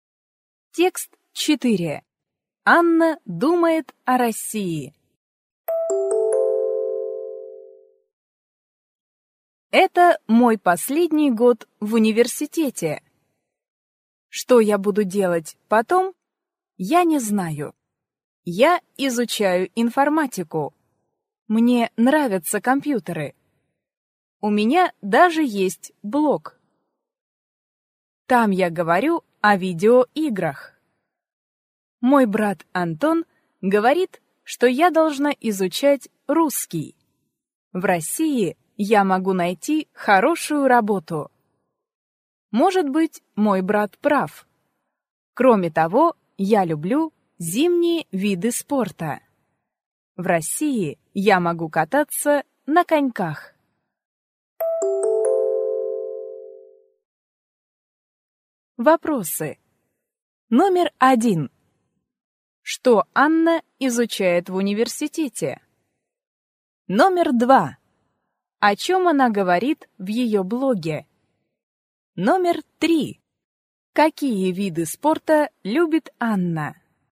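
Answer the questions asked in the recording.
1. Информатику
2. О видеоиграх
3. Зимние виды спорта (кататься на коньках)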